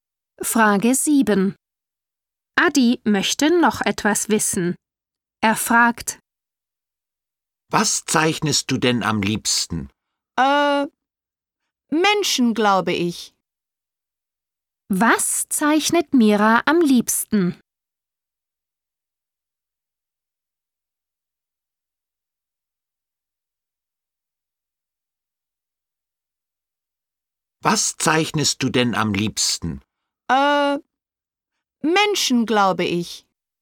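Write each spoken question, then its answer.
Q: Was zeichnet Mira am liebsten?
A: Menschen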